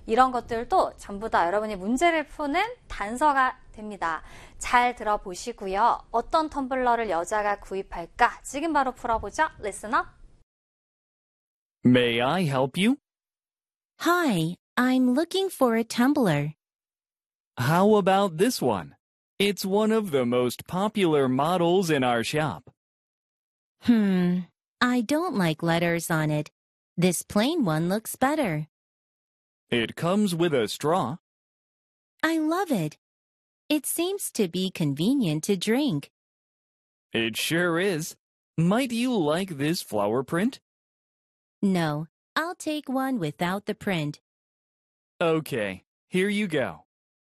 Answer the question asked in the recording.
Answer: 그랬기 때문에 여자는 빨대가 꽂혀 있는 텀블러를 구입할 것 같죠?